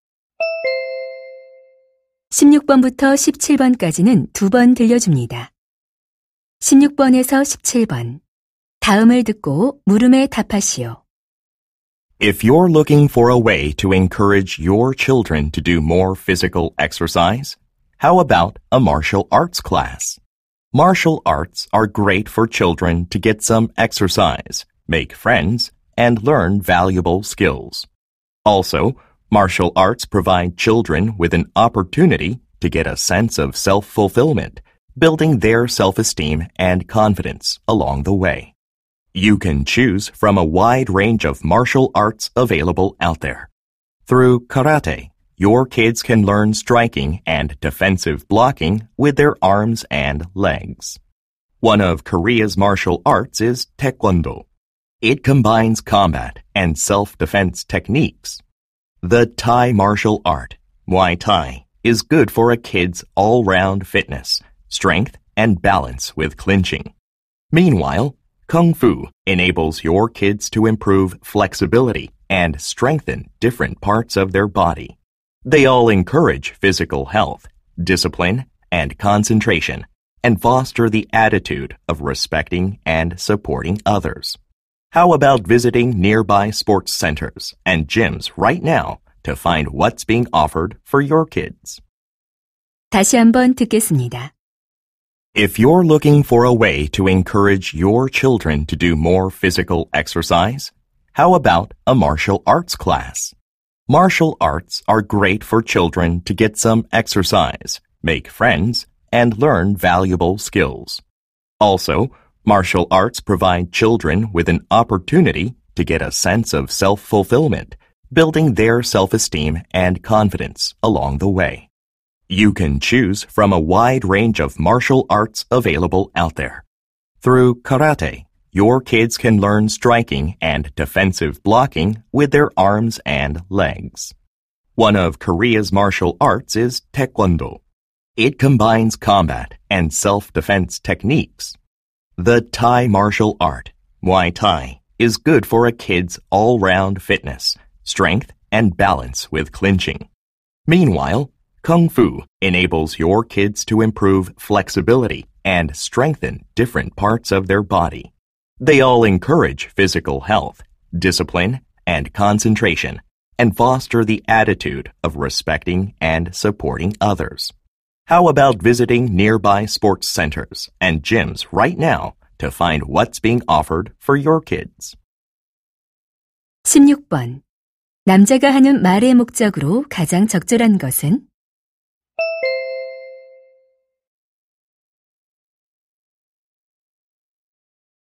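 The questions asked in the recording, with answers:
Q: 남자가 하는 말의 목적으로 가장 적절한 것은?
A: 아이들에게 무술 수업을 권장하려고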